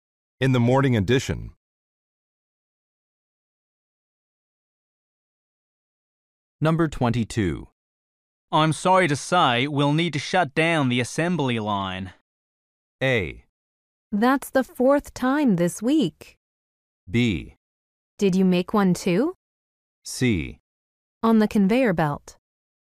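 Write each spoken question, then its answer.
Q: I'm sorry to say, we'll need to shut down the assembly line.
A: A: That's the fourth time this week.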